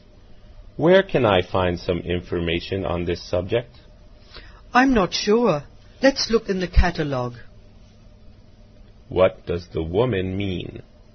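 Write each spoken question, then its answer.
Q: What does the woman mean?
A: They should look in the catalog.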